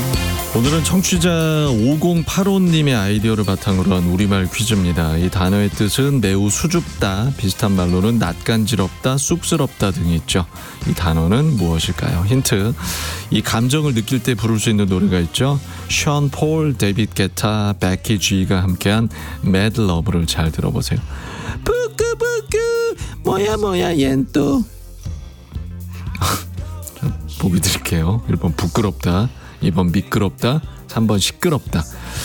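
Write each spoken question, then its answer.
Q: 이 단어는 무엇일까요?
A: 1: 부끄럽다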